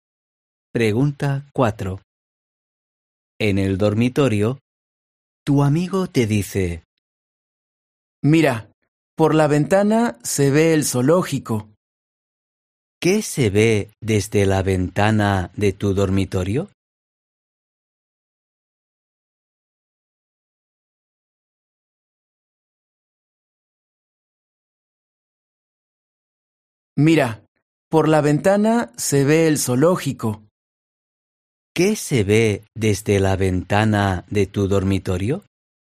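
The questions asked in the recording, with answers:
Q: ¿Qué se ve desde la ventana de tu dormitorio?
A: el zoológico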